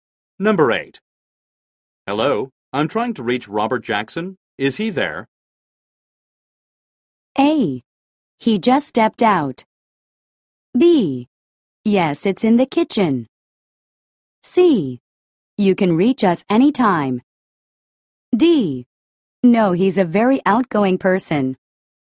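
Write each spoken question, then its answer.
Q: Hello, I'm trying to reach Robert Jackson. Is he there?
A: A: He just stepped out.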